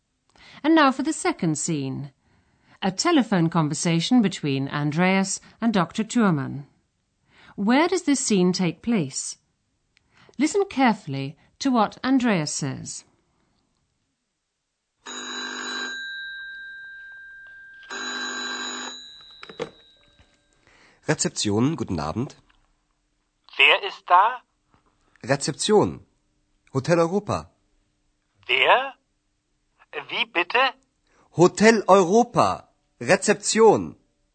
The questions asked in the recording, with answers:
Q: Where does this scene take place?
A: Andreas is in a hotel. He picks up the phone and says, Rezeption.